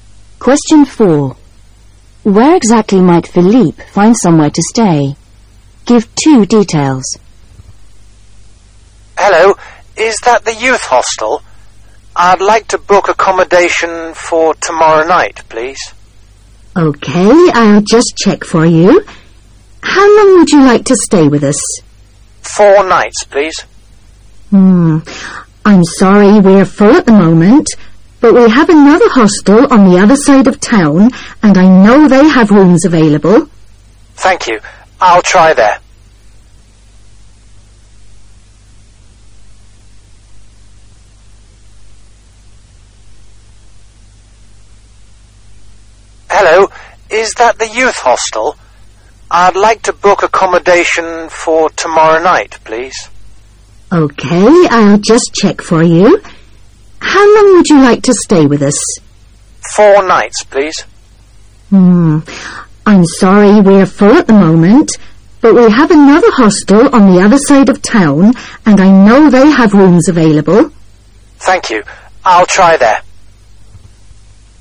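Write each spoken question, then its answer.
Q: Where exactly might Philippe find somewhere to stay?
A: At another youth hostel on the other side of town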